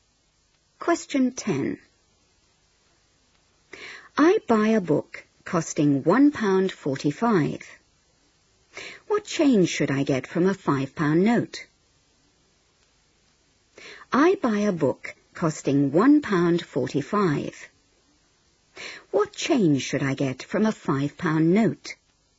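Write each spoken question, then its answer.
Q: What change should I get from a £5 note?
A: £3.55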